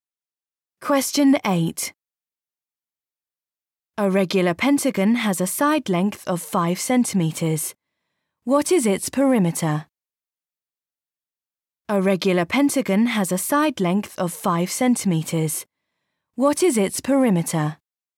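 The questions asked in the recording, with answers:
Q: What is its perimeter?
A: 25 centimetres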